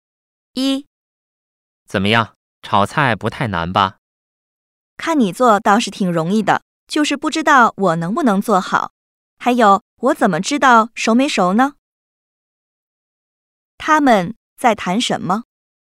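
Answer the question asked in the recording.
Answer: 炒菜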